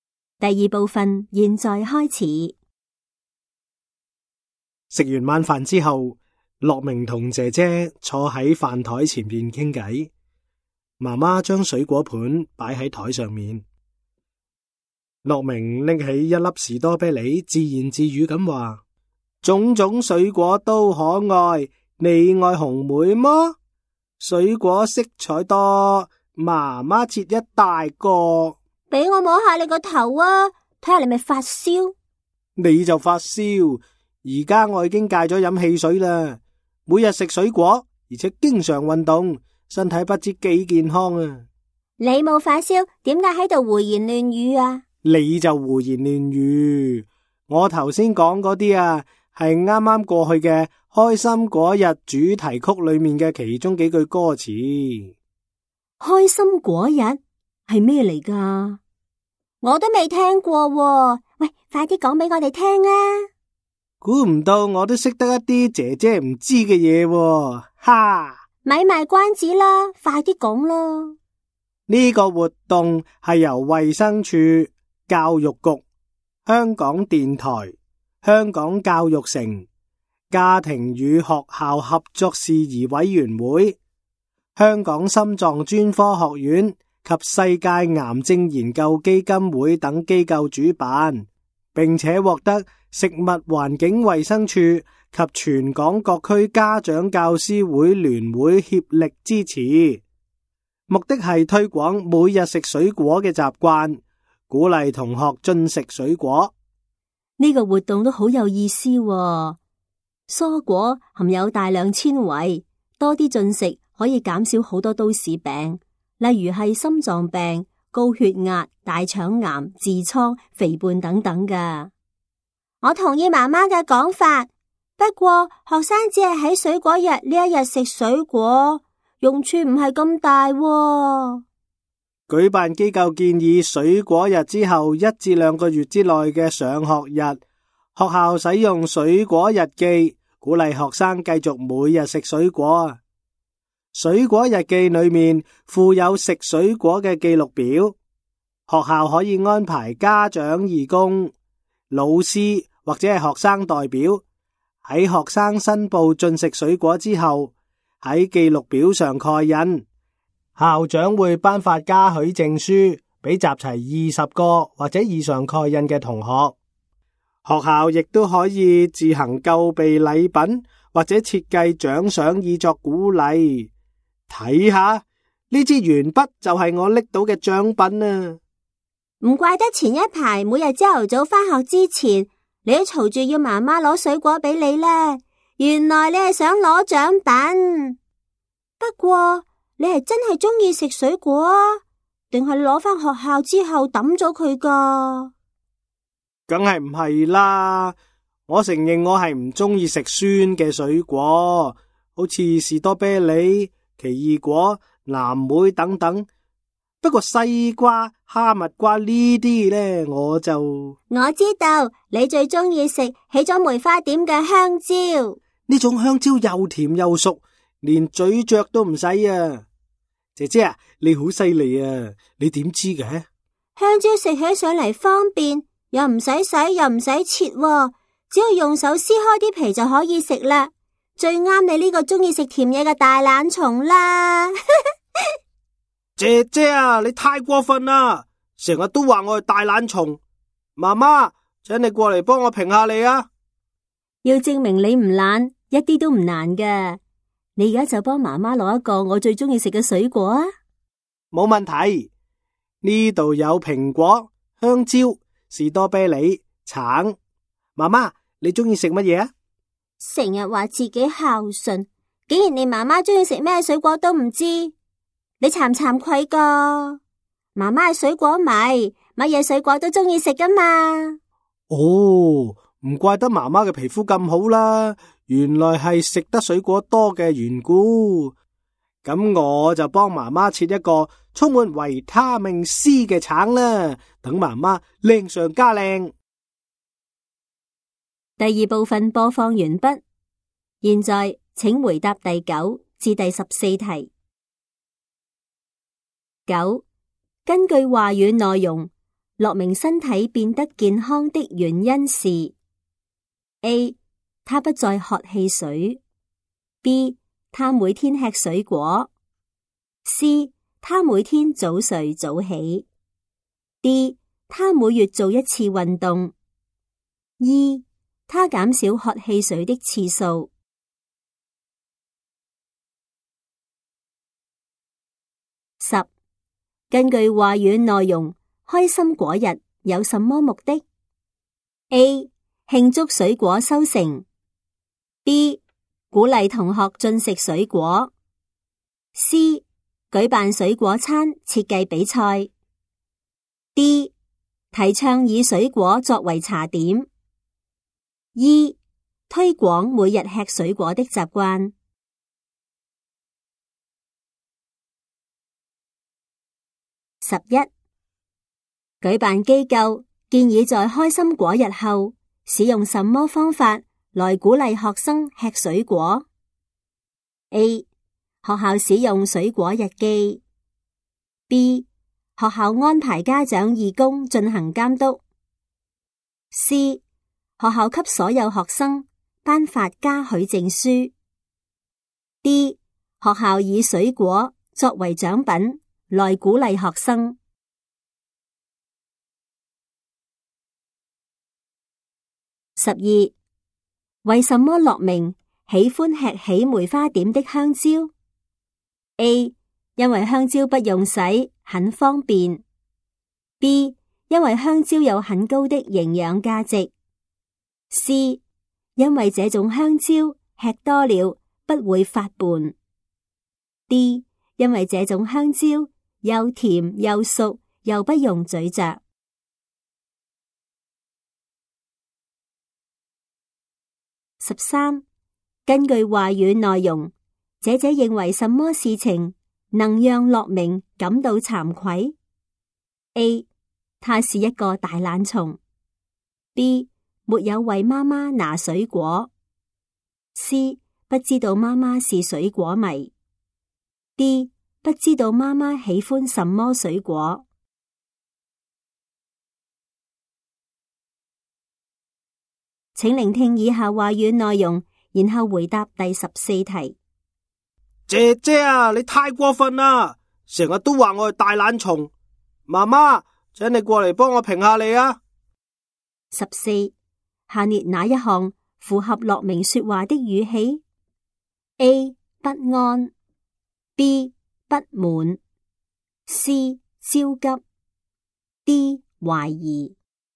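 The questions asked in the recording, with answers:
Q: 根据话语内容,开心果日有什么目的? A. 庆祝水果收成。 B. 鼓励同学进食水果。 C. 举办水果餐设计比赛。 D. 提倡以水果作为茶点。 E. 推广每日吃水果的习惯。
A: B: 鼓励同学进食水果; E: 推广每日吃水果的习惯

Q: 举办机构建议在开心果日后使用什么方法来鼓励学生吃水果? A. 学校使用水果日记。 B. 学校安排家长义工进行监督。 C. 学校给所有学生颁发嘉许证书。 D. 学校以水果作为奖品来鼓励学生。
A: A: 学校使用水果日记

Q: 为什么乐明喜欢吃起梅花点的香蕉? A. 因为香蕉不用洗,很方便。 B. 因为香蕉有很高的营养价值。 C. 因为这种香蕉吃多了不会发胖。 D. 因为这种香蕉又甜又熟又不用咀嚼。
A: D: 因为这种香蕉又甜又熟又不用咀嚼

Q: 根据话语内容,姐姐认为什么事情能让乐明感到惭愧? A. 他是一个大懒虫。 B. 没有为妈妈拿水果。 C. 不知道妈妈是水果迷。 D. 不知道妈妈喜欢什么水果。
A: D: 不知道妈妈喜欢什么水果

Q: 下列哪一项符合乐明说话的语气? A. 不安。 B. 不满。 C. 焦急。 D. 怀疑。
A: B: 不满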